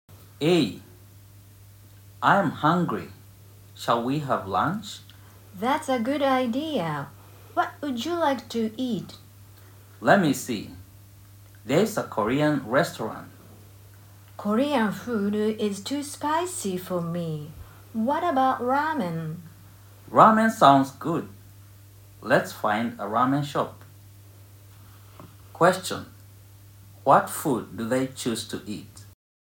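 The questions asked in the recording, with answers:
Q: What food do they choose to eat?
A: Ramen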